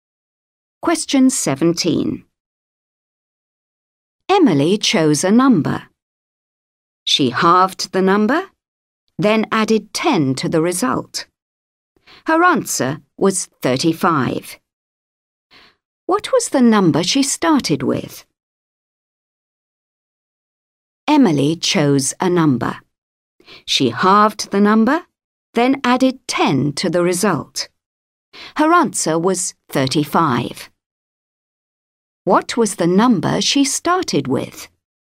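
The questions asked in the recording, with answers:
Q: What was the number she started with?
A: 50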